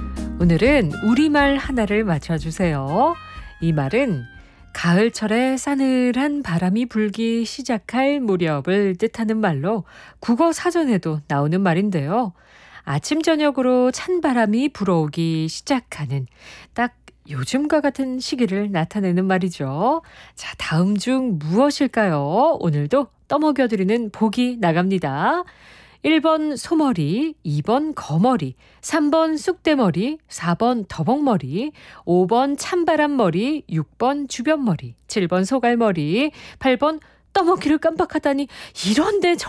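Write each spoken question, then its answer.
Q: 자, 다음 중 무엇일까요?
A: 5: 찬바람머리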